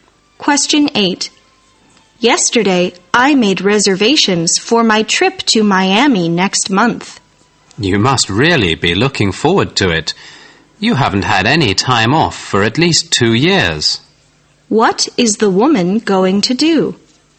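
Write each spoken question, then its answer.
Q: What is the woman going to do?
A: Take a vacation trip to Miami next month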